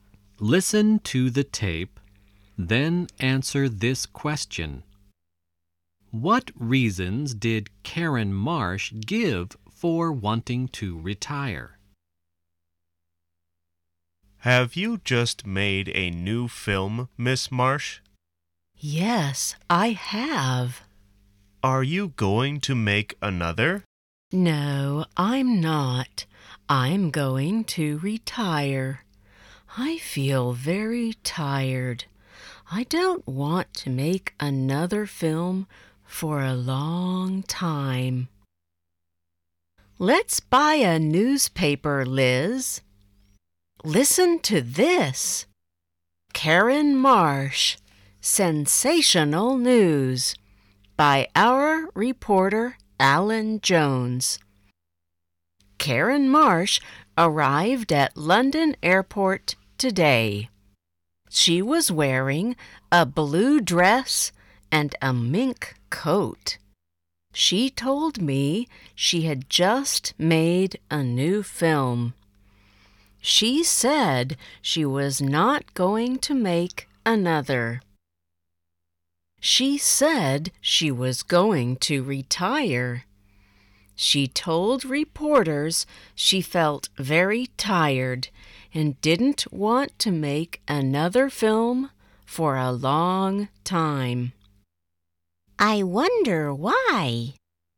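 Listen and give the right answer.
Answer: She felt very tired and didn't want to make another film for a long time.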